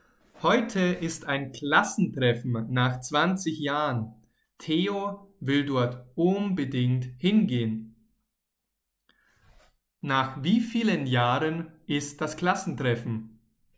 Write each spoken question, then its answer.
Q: Nach wie vielen Jahren ist das Klassentreffen?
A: Nach 20 Jahren. Das Klassentreffen ist nach 20 Jahren.